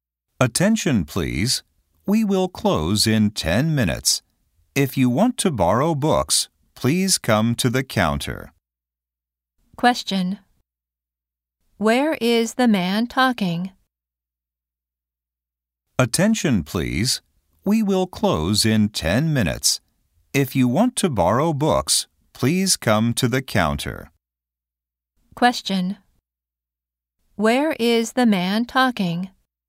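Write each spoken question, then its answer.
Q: Where is the man talking?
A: At a library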